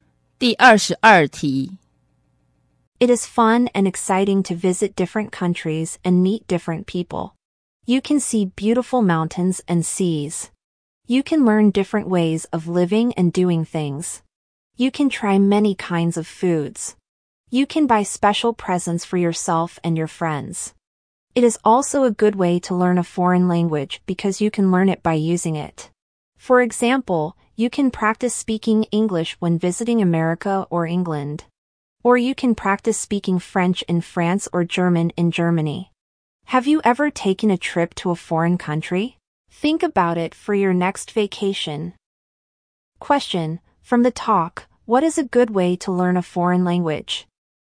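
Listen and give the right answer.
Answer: Visiting foreign countries and using the language there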